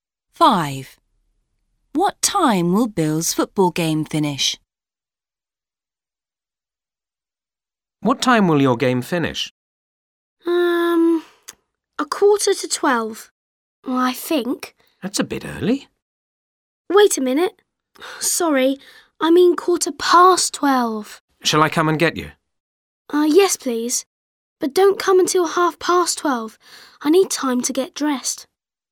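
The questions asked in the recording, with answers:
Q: What time will Bill's football game finish?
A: 12:15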